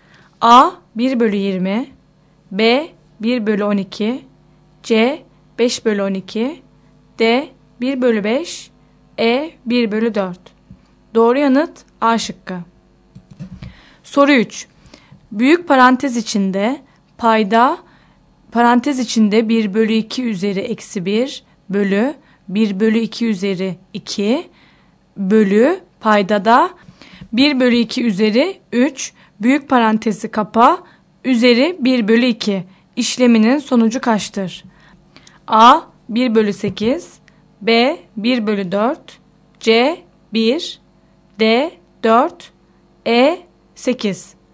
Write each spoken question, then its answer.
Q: Büyük parantez içinde payda parantez içinde 1 bölü 2 üzeri eksi 1 bölü 1 bölü 2 üzeri 2 bölü payda da 1 bölü 2 üzeri 3 büyük parantezi kapa üzeri 1 bölü 2 işleminin sonucu kaçtır?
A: Doğru yanıt E şıkkı.